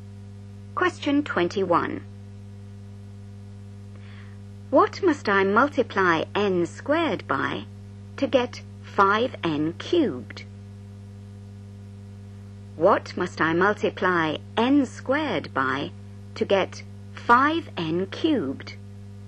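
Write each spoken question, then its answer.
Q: What must I multiply n squared by to get 5n cubed?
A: 5n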